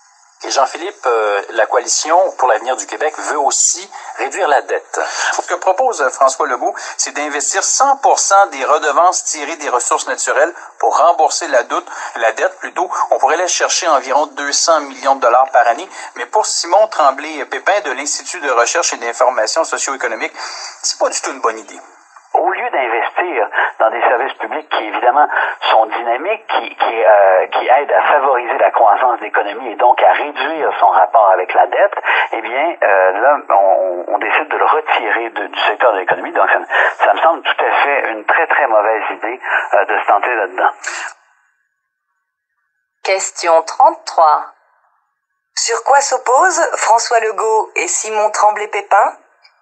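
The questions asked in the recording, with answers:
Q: Sur quoi s'opposent François Legault et Simon Tremblay-Pépin?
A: Sur l'utilisation de 100 % des redevances des ressources naturelles pour rembourser la dette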